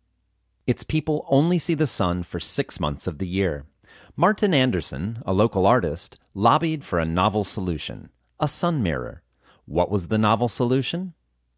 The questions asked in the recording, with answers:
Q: What was the novel solution?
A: The novel solution was a sun mirror.